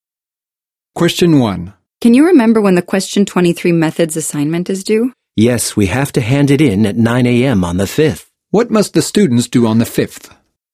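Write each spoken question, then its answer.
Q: What must the students do on the 5th?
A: Hand in their methods assignment by 9 a.m.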